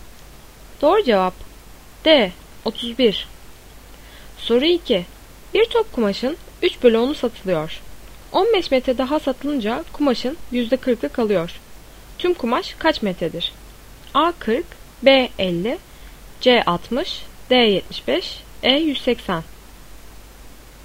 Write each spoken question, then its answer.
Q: Tüm kumaş kaç metredir?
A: Doğru cevap B50.